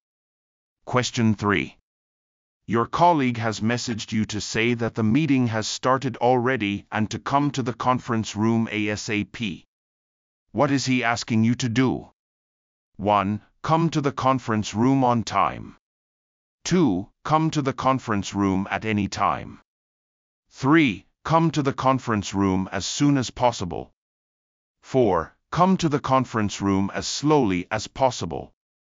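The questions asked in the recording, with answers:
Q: What is he asking you to do?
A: 3: Come to the conference room as soon as possible.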